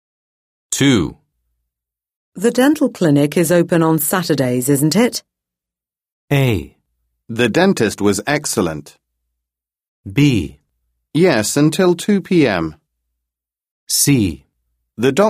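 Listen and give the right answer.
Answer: B: Yes, until 2 p.m.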